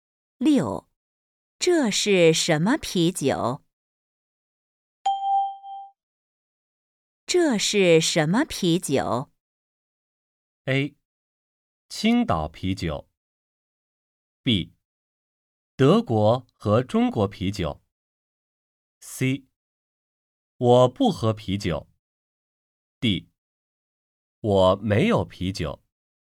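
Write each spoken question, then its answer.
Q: 这是什么啤酒?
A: A: 青岛啤酒。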